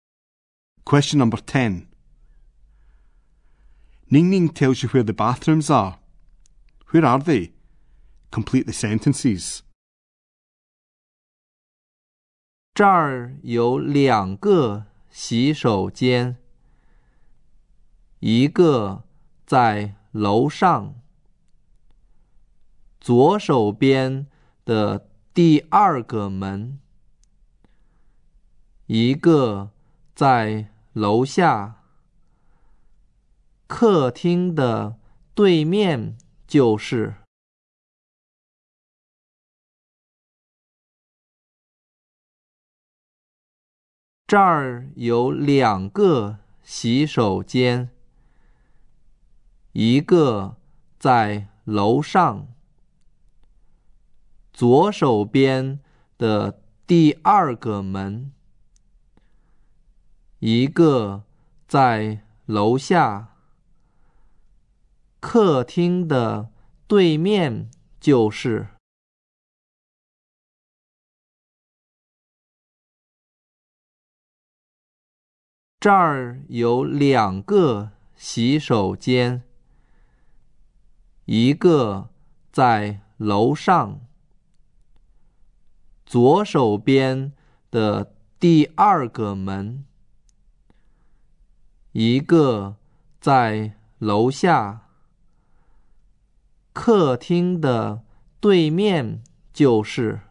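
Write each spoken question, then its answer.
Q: Where are they?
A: One upstairs, the second door on the left; one downstairs, opposite the living room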